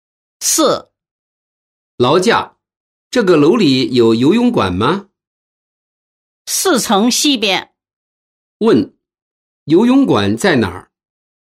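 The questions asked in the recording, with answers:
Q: 游泳馆在哪儿?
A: 四层西边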